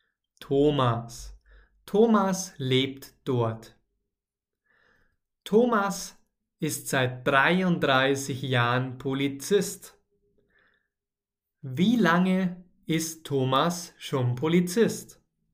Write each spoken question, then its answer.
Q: Wie lange ist Thomas schon Polizist?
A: Seit 33 Jahren. Er ist seit 33 Jahren Polizist.